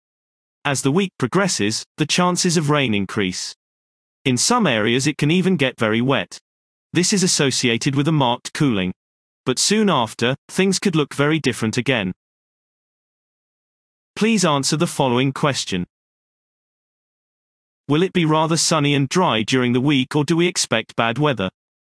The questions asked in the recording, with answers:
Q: Will it be rather sunny and dry during the week, or do we expect bad weather?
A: So, bad weather is predicted.